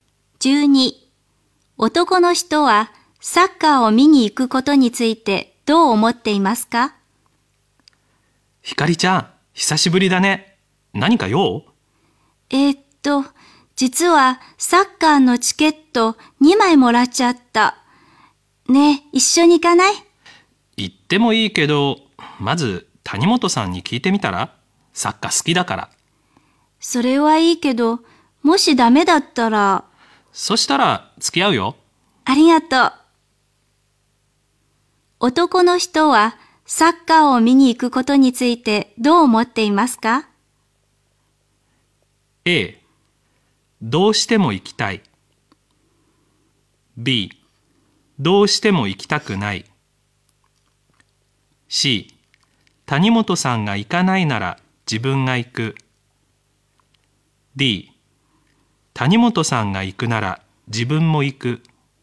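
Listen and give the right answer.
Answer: C: 谷本さんが行かないなら自分が行く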